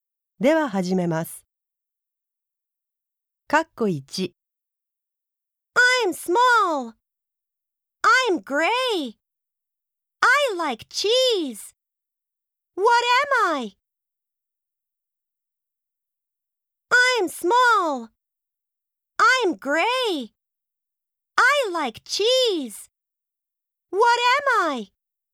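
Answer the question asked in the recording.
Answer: A mouse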